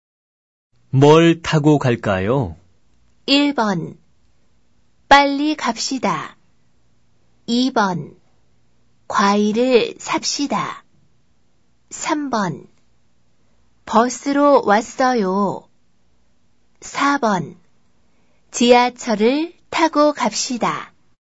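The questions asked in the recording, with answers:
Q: 뭘 타고 갈까요?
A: 4: 지하철을 타고 갑시다.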